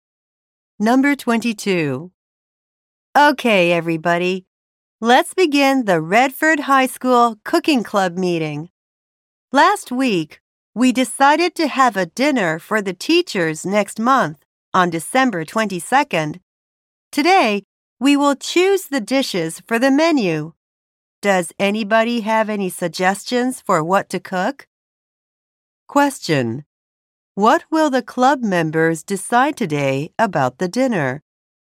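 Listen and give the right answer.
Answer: The dishes for the menu.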